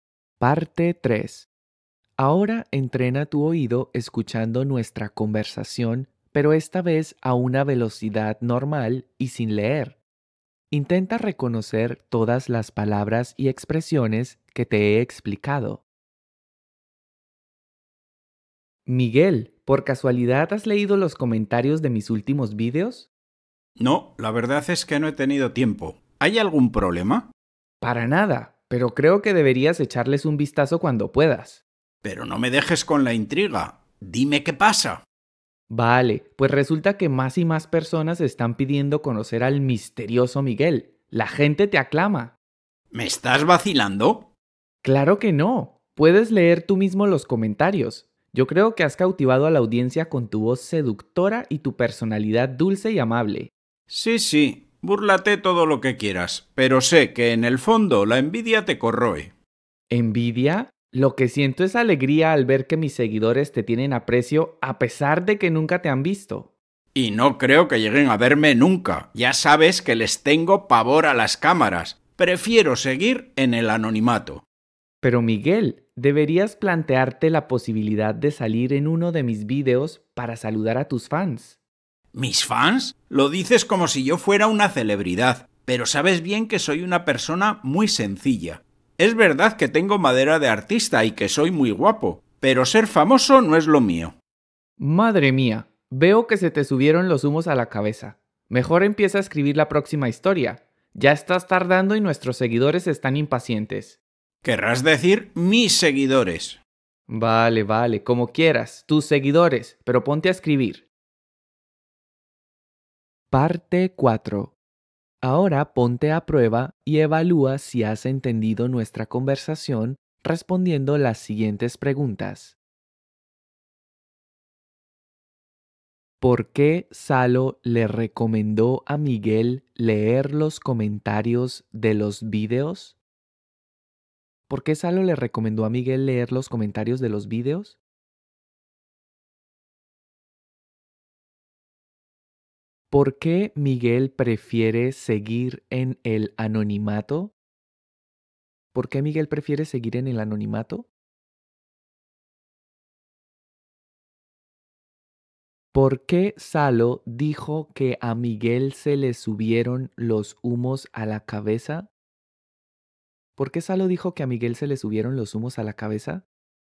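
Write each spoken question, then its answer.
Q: ¿Por qué Salo le recomendó a Miguel leer los comentarios de los vídeos?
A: Porque cada vez más personas piden conocer al misterioso Miguel; la gente lo aclama.

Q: ¿Por qué Miguel prefiere seguir en el anonimato?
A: Porque les tiene pavor a las cámaras.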